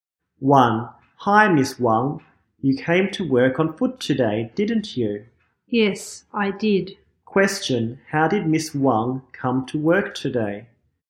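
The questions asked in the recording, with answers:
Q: How did Miss Wang come to work today?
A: On foot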